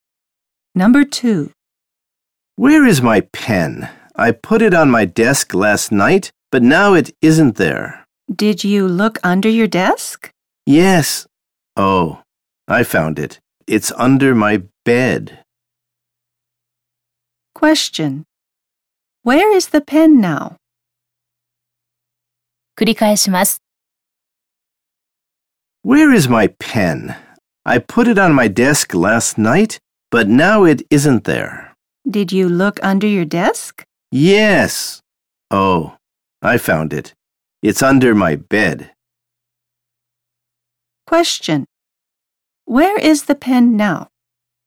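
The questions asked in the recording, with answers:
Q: Question. Where is the pen now?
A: Under his bed.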